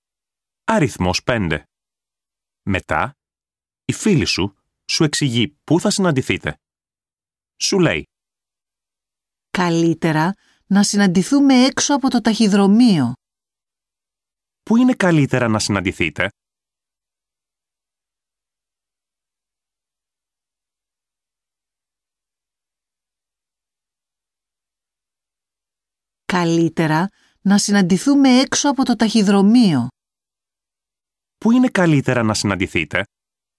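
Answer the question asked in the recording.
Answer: έξω από το ταχυδρομείο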